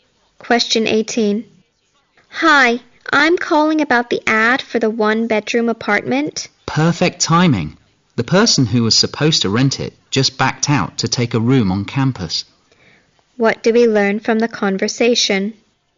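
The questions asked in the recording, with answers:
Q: What do we learn from the conversation?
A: The one-bedroom apartment is still available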